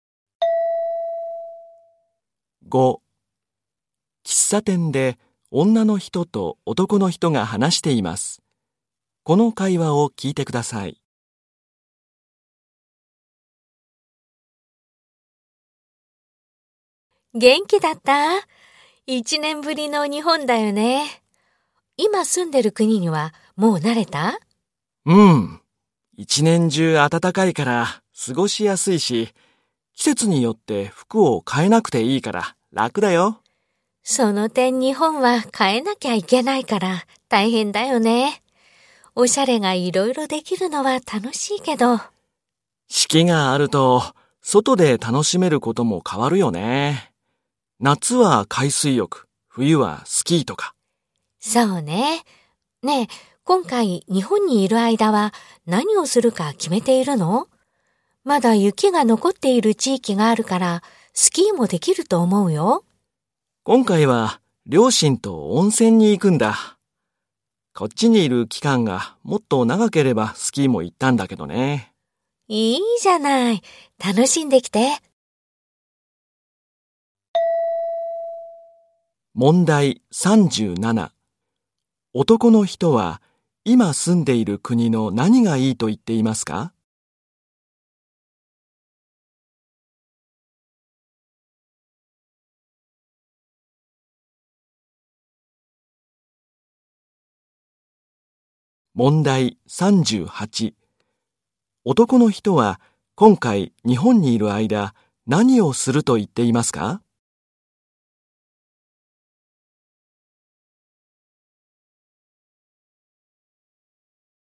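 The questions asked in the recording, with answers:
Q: 男の人は今住んでいる国の何がいいと言っていますか?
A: 一年中暖かく、季節で服を変えなくていいこと

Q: 男の人は今回日本にいる間何をすると言っていますか?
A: 両親と温泉に行く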